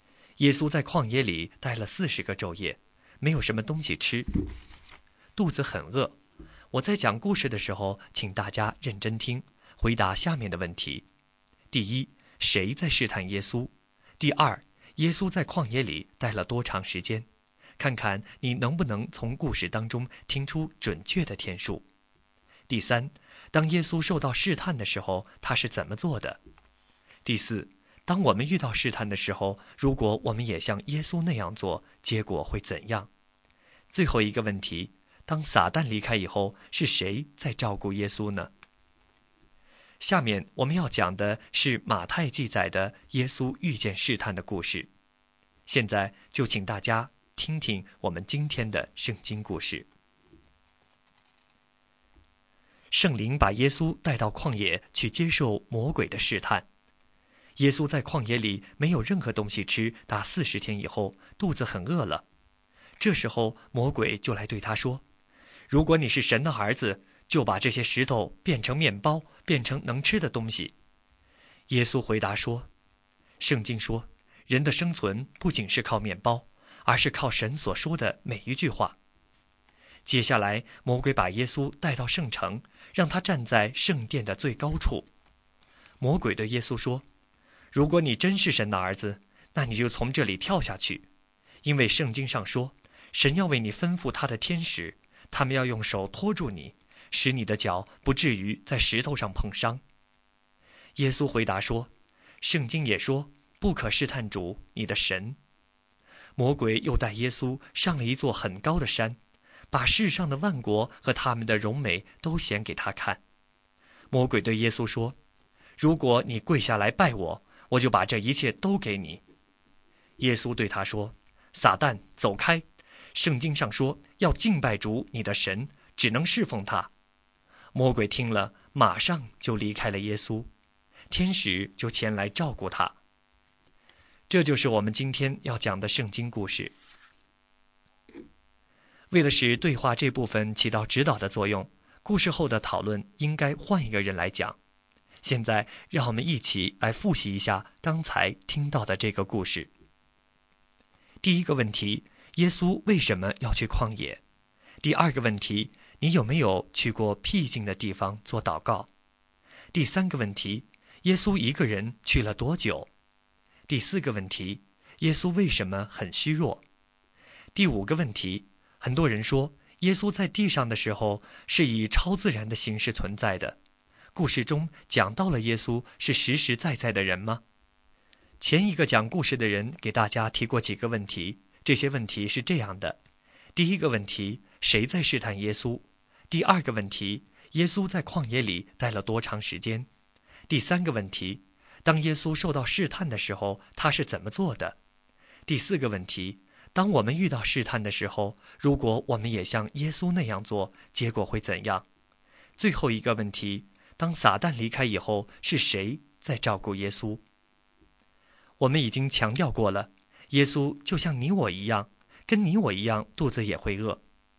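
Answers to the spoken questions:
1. 魔鬼(撒旦)
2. 四十天(四十个昼夜)
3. 他用圣经上的话回答魔鬼,拒绝了试探
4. 天使
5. 圣灵带他去接受魔鬼的试探
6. 四十天
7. 四十天没有东西吃,肚子很饿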